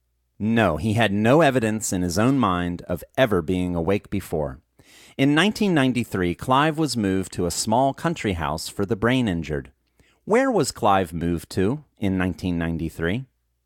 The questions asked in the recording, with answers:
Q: Where was Clive moved to in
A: Clive was moved to a small country house for the brain injured in 1993.